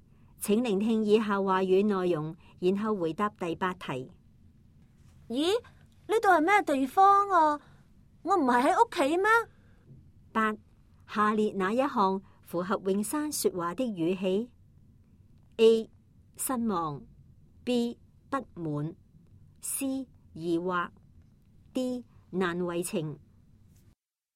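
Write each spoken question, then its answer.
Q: 下列哪一项符合永山说话的语气 ?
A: C: 疑惑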